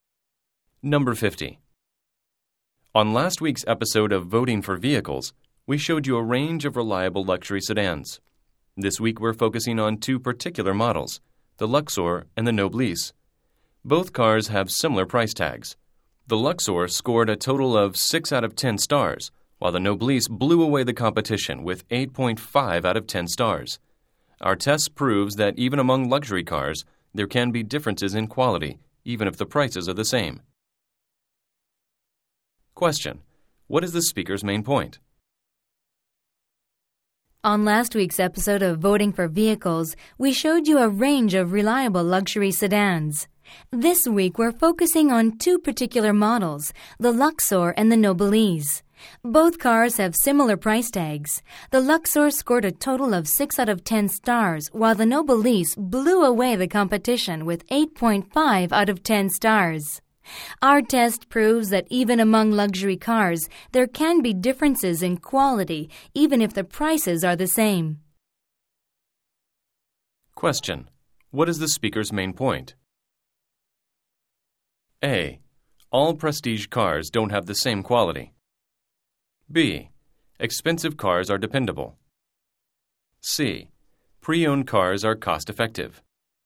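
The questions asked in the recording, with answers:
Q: What is the speaker's main point?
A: A: All prestige cars don't have the same quality.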